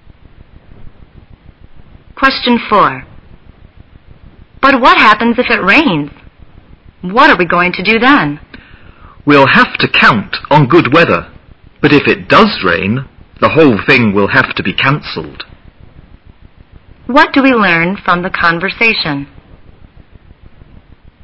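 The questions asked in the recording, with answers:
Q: What do we learn from the conversation?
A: The event will be cancelled if it rains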